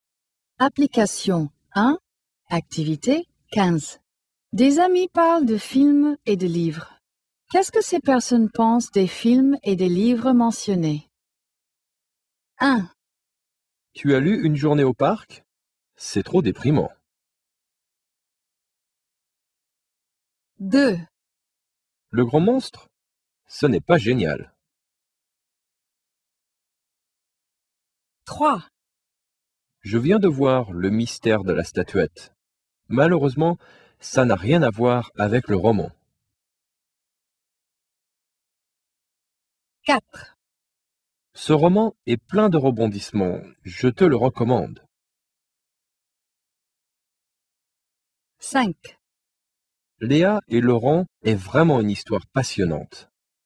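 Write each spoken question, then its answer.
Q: Qu'est-ce que ces personnes pensent des films et des livres mentionnés?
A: Opinion négative : c'est trop déprimant

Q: Qu'est-ce que ces personnes pensent des films et des livres mentionnés?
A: Opinion négative : ce n'est pas génial

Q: Qu'est-ce que ces personnes pensent des films et des livres mentionnés?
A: Opinion négative : le film n'a rien à voir avec le roman

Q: Qu'est-ce que ces personnes pensent des films et des livres mentionnés?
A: Opinion positive : plein de rebondissements, recommandé

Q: Qu'est-ce que ces personnes pensent des films et des livres mentionnés?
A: Opinion positive : histoire passionnante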